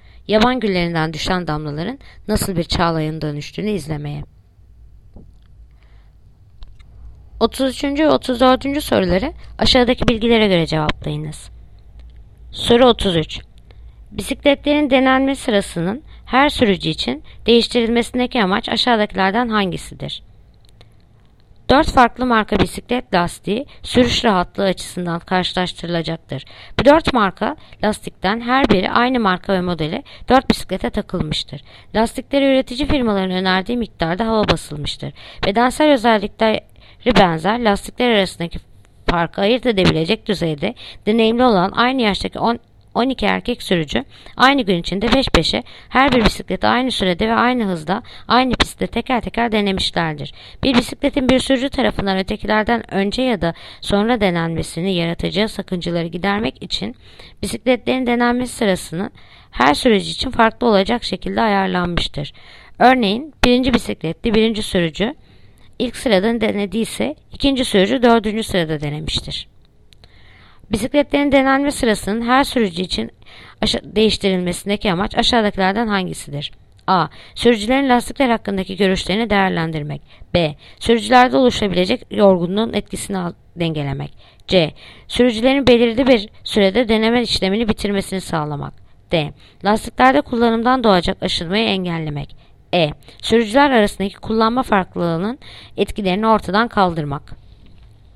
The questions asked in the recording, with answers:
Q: Bisikletlerin denenme sırasının her sürücü için değiştirilmesindeki amaç aşağıdakilerden hangisidir?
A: Yanıt Bursa. Sürücülerde oluşabilecek yorgunluğun etkisini dengelemek.